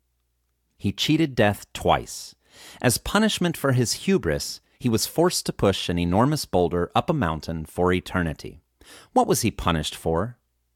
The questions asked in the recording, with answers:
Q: What was he punished for?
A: He was punished for his hubris.